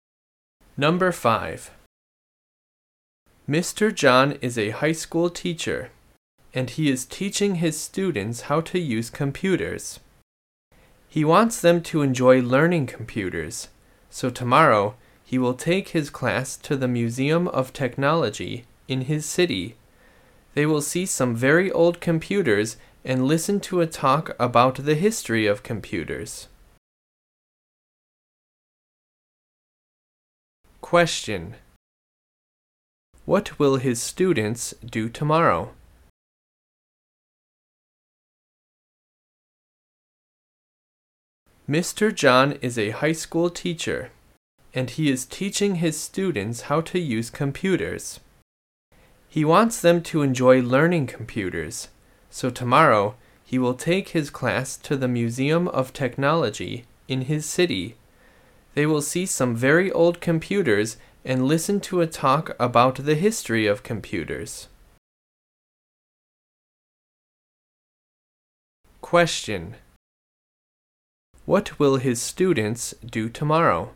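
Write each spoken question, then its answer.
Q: What will his students do tomorrow?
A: Visit the Museum of Technology to see old computers and hear a talk on computer history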